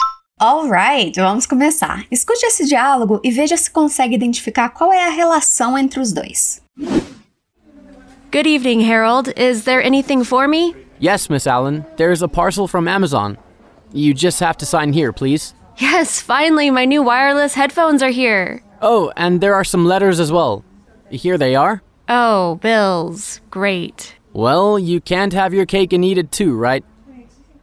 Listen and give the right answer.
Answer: O Harold é o porteiro do prédio e a Miss Allen é uma moradora.